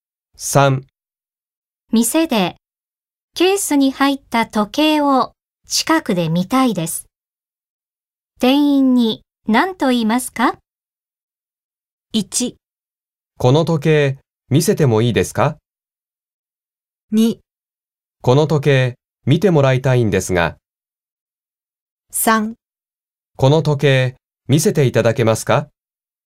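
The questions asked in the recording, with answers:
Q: 店でケースに入った時計を近くで見たいです。店員に何と言いますか?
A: 3: この時計見せていただけますか?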